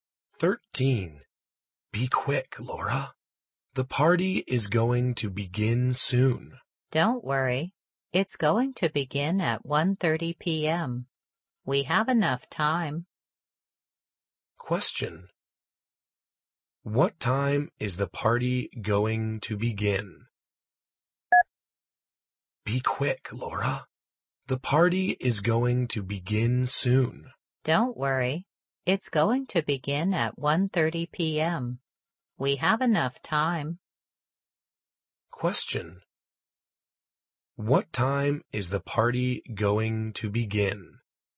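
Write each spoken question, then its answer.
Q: What time is the party going to begin?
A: At 1:30 p.m.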